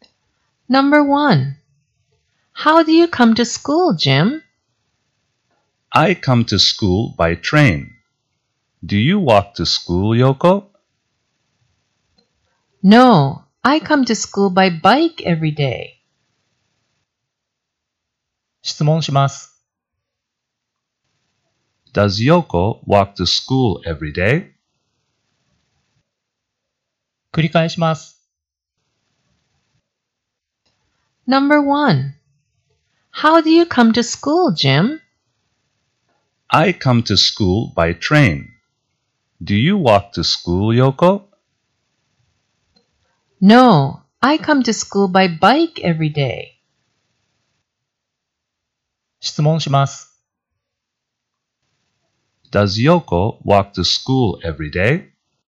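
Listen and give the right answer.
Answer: No, she doesn't. She comes by bike.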